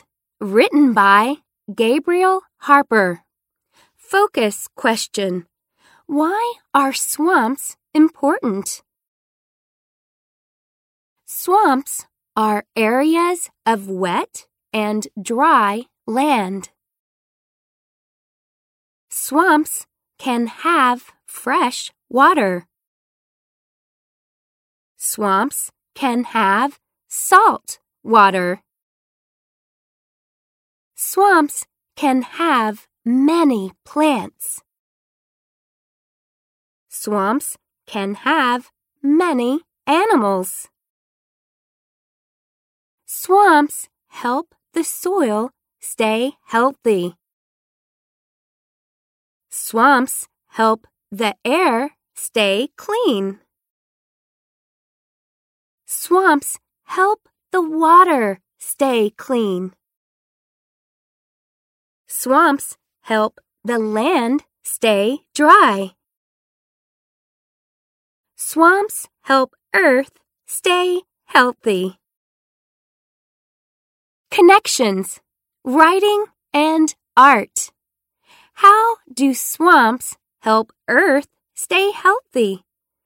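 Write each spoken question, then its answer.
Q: Why are swamps important?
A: They help Earth stay healthy (keeping soil healthy, air and water clean, and land dry).

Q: How do swamps help Earth stay healthy?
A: They help the soil stay healthy, the air and water stay clean, and the land stay dry.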